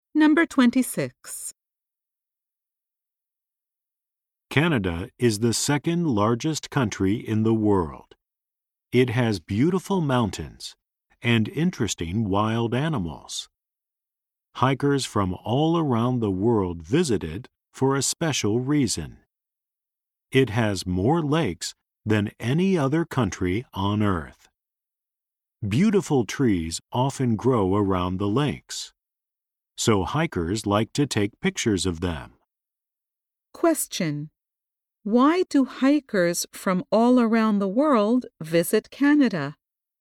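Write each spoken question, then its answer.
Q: why do hikers from all around the world visit Canada?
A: It has more lakes than any other country.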